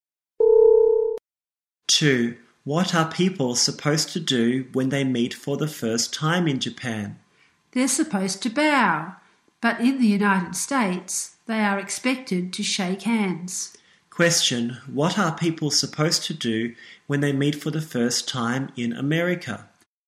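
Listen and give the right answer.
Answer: Shake hands.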